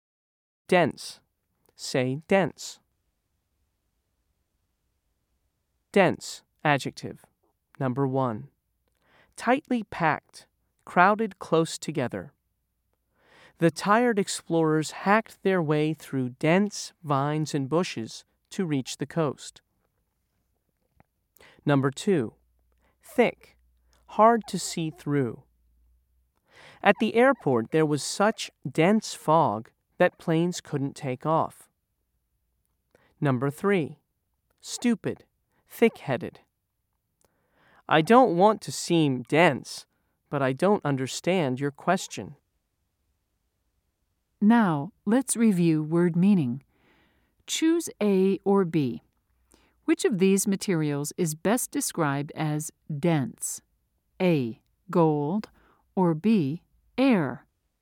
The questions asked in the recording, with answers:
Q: Choose A or B. Which of these materials is best described as dense?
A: If you said A, you're right.